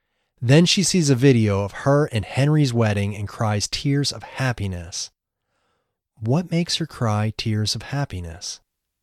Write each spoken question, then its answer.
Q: What makes her cry tears of happiness?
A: Seeing a video of her and Henry's wedding makes her cry tears of happiness.